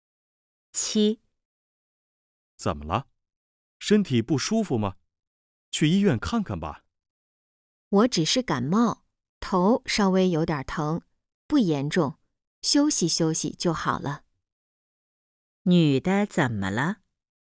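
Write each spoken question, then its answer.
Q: 女的怎么了?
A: 感冒了,头有点疼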